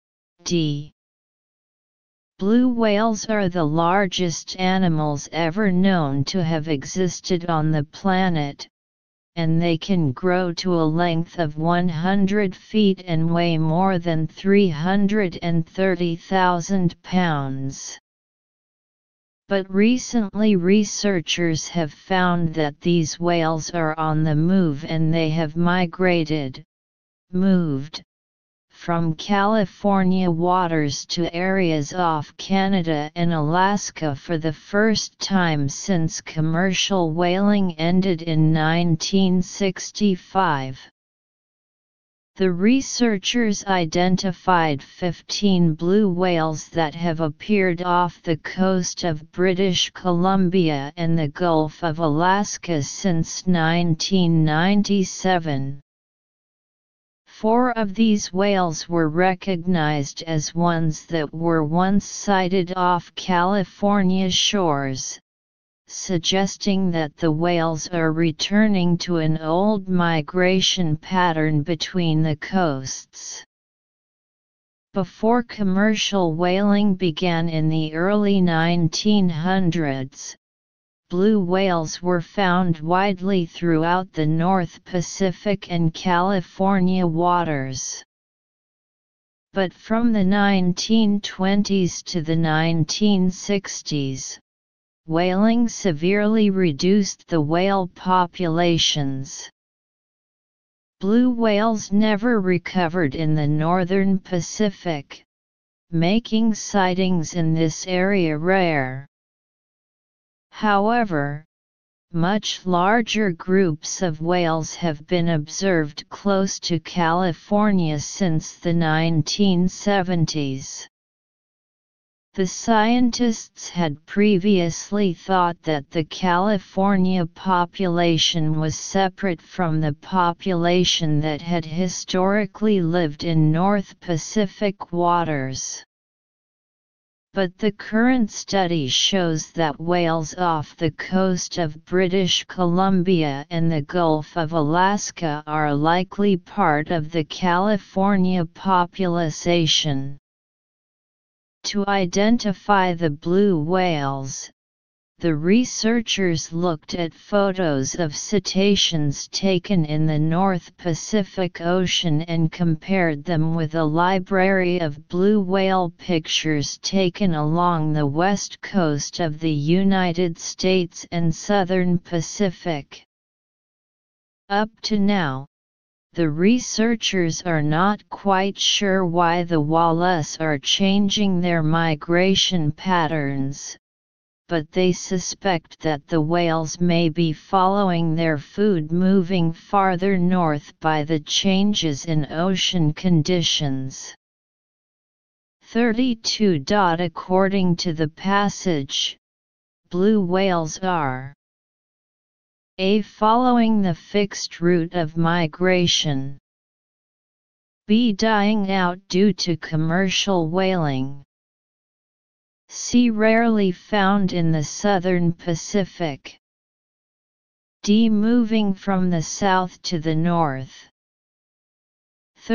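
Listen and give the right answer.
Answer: D: Moving from the south to the north.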